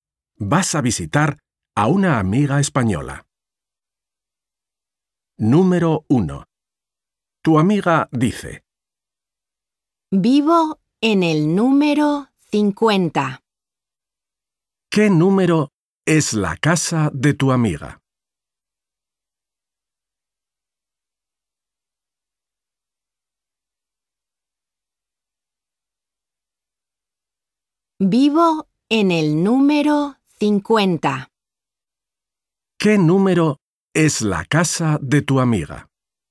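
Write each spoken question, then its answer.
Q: ¿Qué número es la casa de tu amiga?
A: 50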